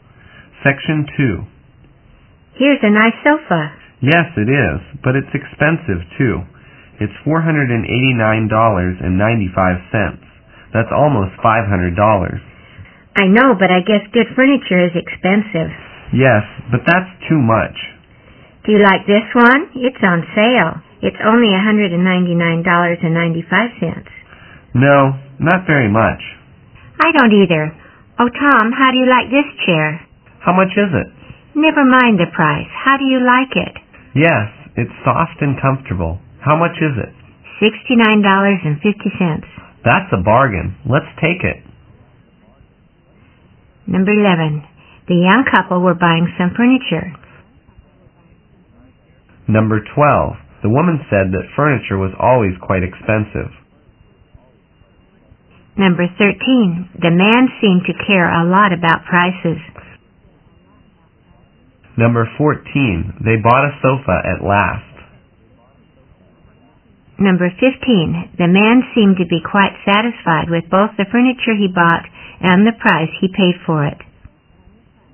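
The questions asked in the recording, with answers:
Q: The young couple were buying some furniture.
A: True

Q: The man seemed to care a lot about prices.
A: True

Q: They bought a sofa at last.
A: False

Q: The man seemed to be quite satisfied with both the furniture he bought and the price he paid for it.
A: True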